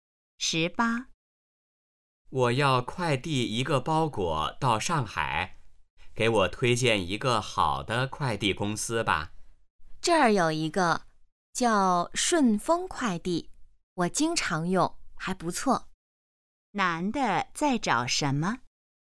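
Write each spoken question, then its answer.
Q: 男的在找什么?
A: 好的快递公司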